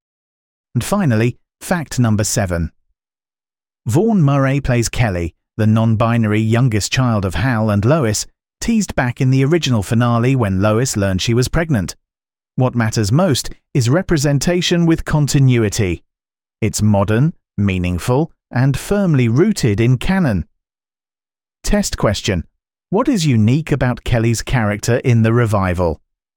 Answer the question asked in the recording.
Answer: Correct answer. Kelly is non-binary.